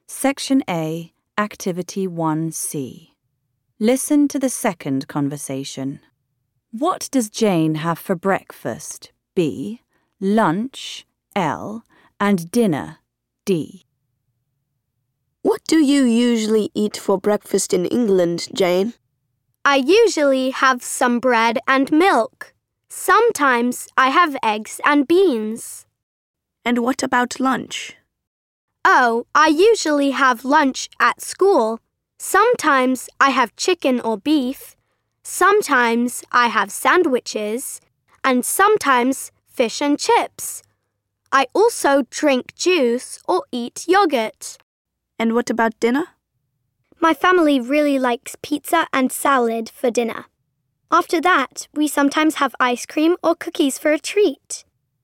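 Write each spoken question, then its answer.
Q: What does Jane have for breakfast?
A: bread and milk, sometimes eggs and beans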